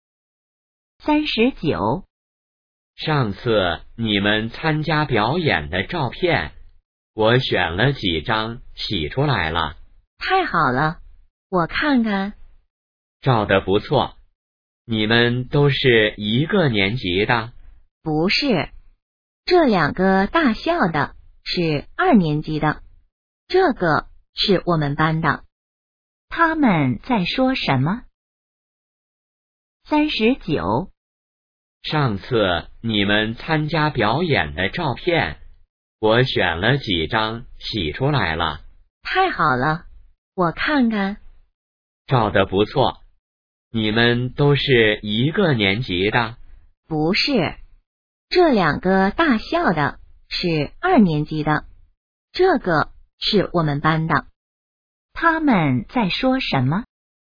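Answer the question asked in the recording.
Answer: 表演的照片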